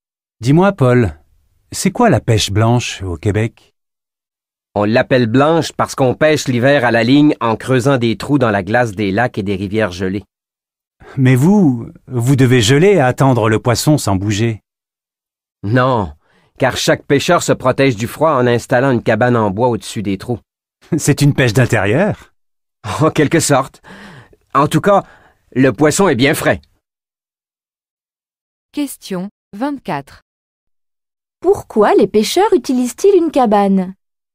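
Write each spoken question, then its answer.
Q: Pourquoi les pêcheurs utilisent-ils une cabane?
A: Pour se protéger du froid.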